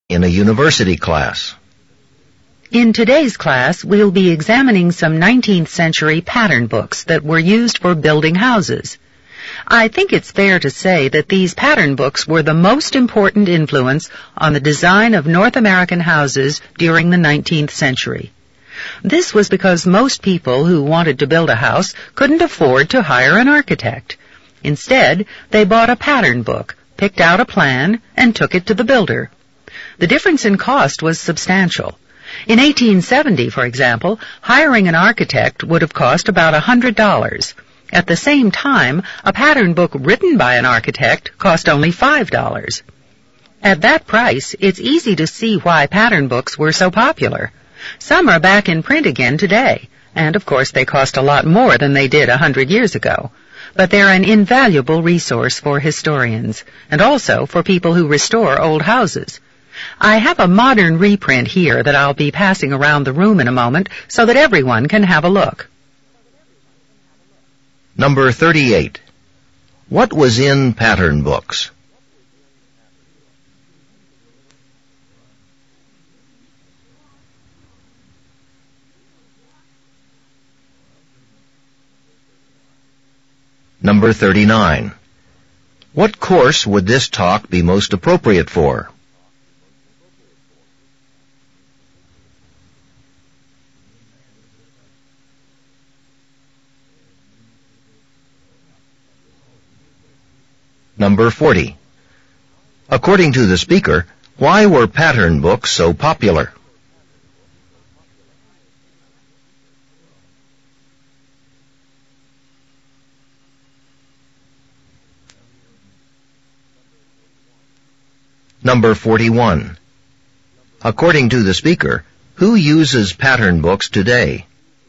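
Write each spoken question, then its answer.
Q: What was in pattern books?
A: House plans

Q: According to the speaker, why were pattern books so popular?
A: They were much cheaper than hiring an architect

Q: According to the speaker, who uses pattern books today?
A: Historians and people who restore old houses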